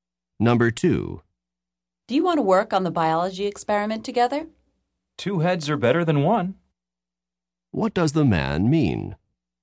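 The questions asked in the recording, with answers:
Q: What does the man mean?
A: They should work on it together; it's easier with two people.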